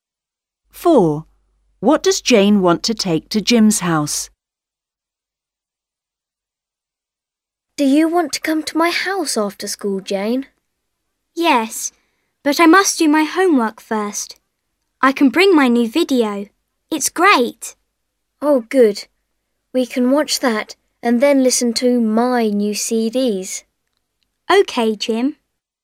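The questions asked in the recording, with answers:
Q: What does Jane want to take to Jim's house?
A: Her new video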